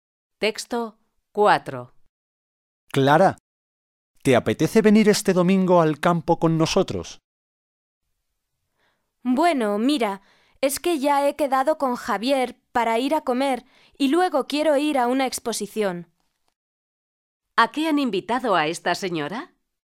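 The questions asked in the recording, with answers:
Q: ¿A qué han invitado a esta señora?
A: A ir al campo el domingo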